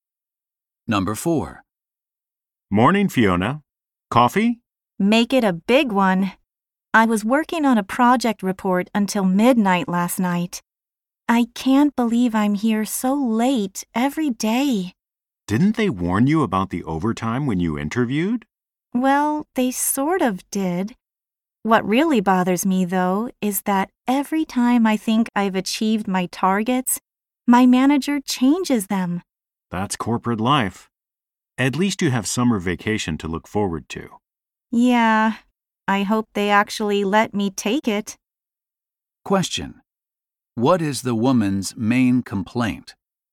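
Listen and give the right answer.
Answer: Her manager keeps changing her targets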